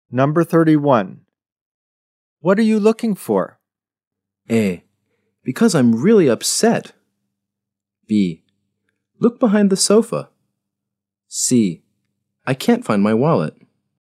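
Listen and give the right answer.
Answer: C: I can't find my wallet.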